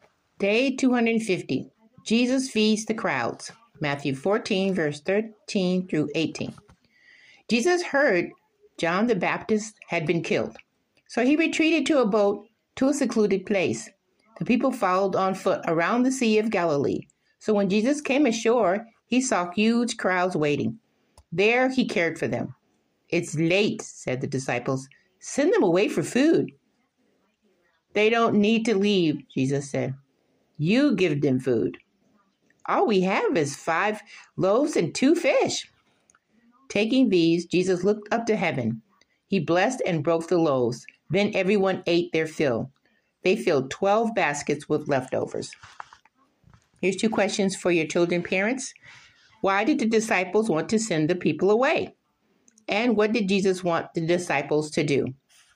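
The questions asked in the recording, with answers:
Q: Why did the disciples want to send the people away?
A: It was late and the people needed food

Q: And what did Jesus want the disciples to do?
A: Give the people food themselves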